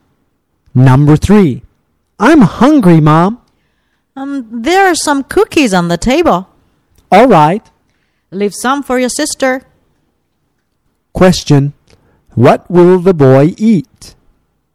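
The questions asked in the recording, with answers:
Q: Question, what will the boy eat?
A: Some cookies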